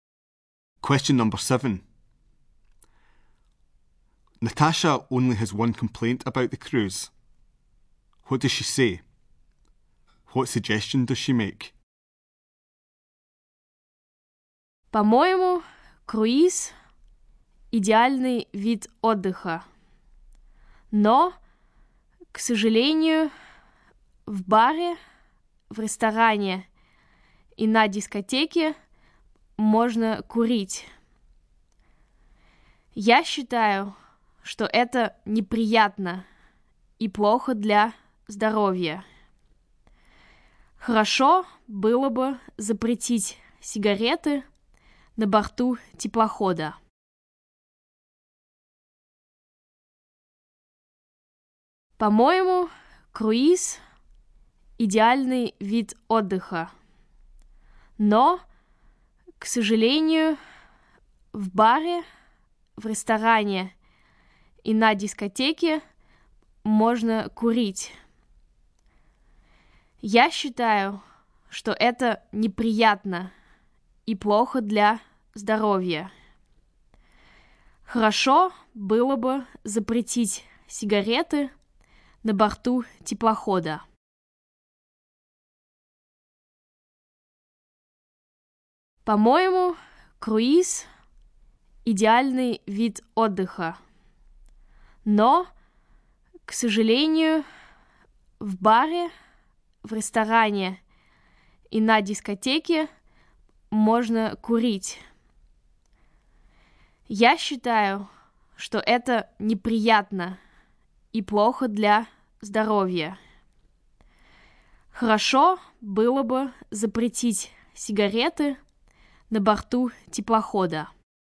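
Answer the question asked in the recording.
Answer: Smoking is allowed in the bar, restaurant and disco, which is unpleasant and unhealthy; ban cigarettes on board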